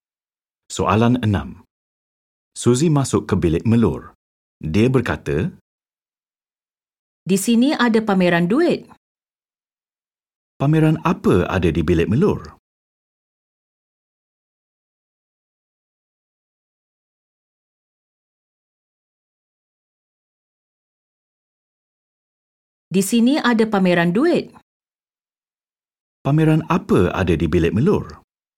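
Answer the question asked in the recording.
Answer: Pameran duit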